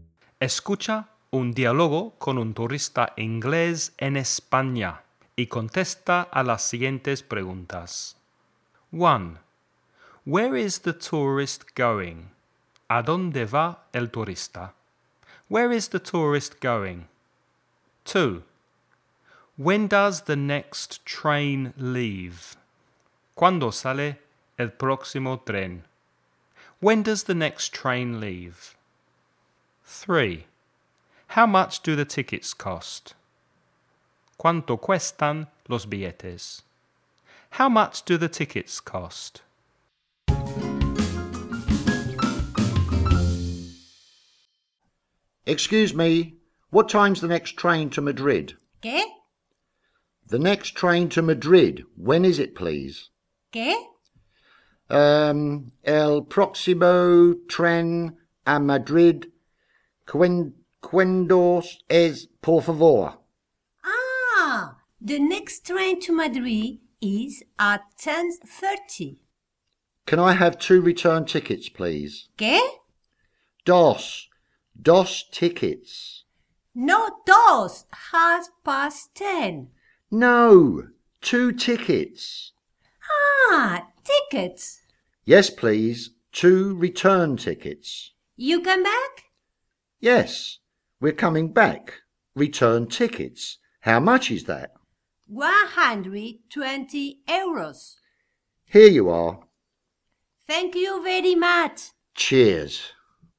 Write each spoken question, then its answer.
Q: Where is the tourist going?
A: He's going to Madrid.

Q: When does the next train leave?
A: It leaves at 10:30.

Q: How much do the tickets cost?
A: 120 euros.